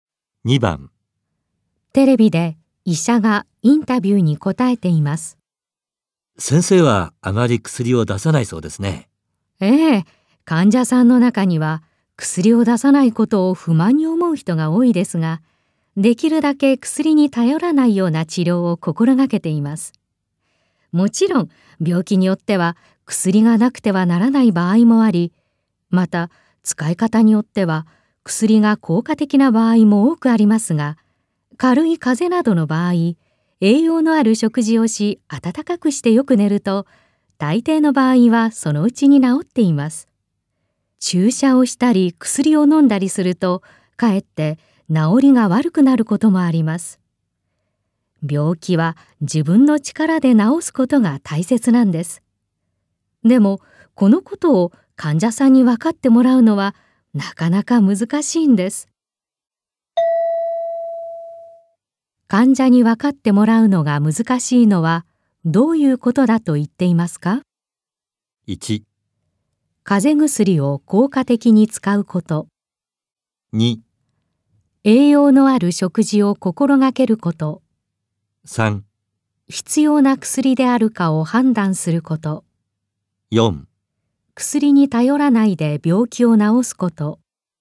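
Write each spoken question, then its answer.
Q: 患者に分かってもらうのが難しいのは、どういうことだと言っていますか?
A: 4: 薬に頼らないで病気を治すこと。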